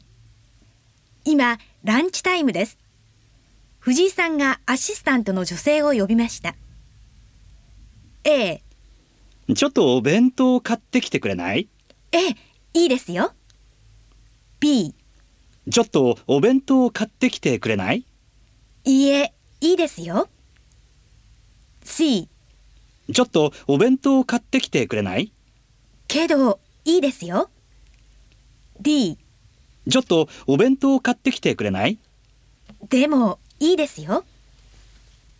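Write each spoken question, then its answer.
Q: ちょっとお弁当を買ってきてくれない?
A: A: ええ、いいですよ。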